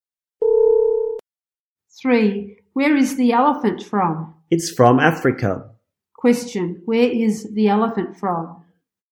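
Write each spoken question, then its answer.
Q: Question, where is the elephant from?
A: Africa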